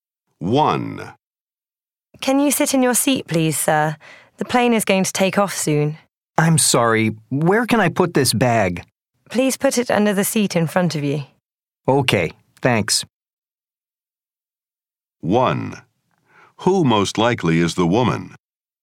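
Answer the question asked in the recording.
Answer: A flight attendant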